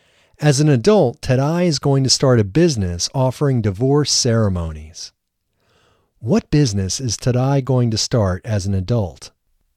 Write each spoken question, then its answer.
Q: What business is Tadai going to start as an adult?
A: Tadai is going to start a business offering divorce ceremonies as an adult.